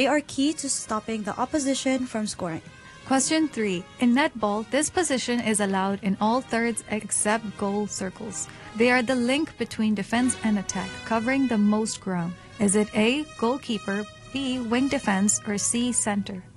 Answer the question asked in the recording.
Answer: The correct answer is C, center.